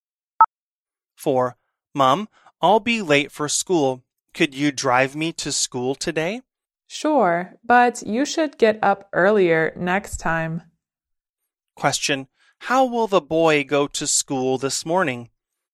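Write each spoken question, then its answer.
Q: How will the boy go to school this morning?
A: By car (his mom will drive him)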